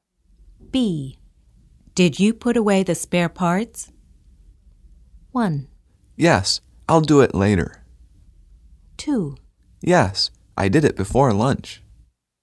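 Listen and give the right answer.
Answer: 2: Yes, I did it before lunch.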